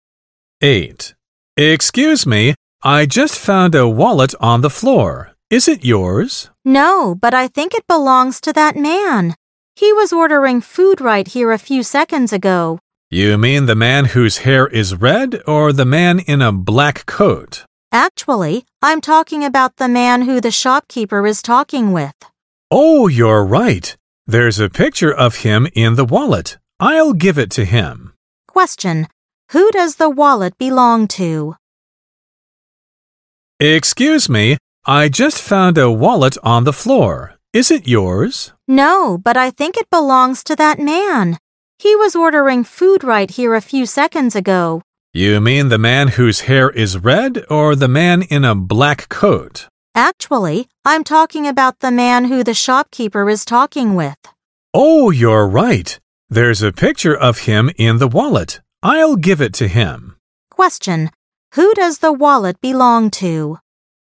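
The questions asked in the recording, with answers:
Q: who does the wallet belong to?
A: The man the shopkeeper is talking with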